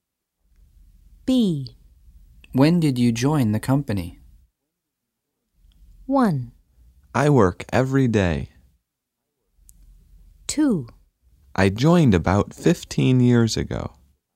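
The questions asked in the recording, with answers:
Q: When did you join the company?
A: 2: I joined about 15 years ago.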